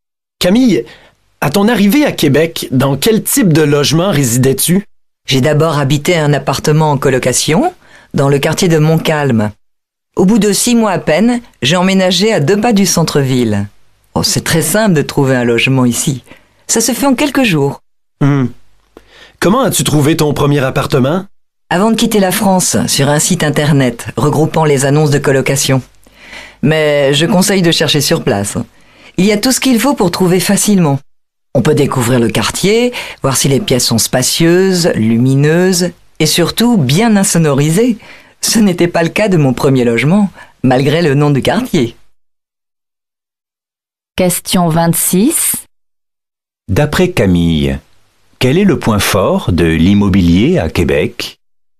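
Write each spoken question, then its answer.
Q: D'après Camille, quel est le point fort de l'immobilier à Québec?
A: Il est très simple et rapide de trouver un logement (en quelques jours).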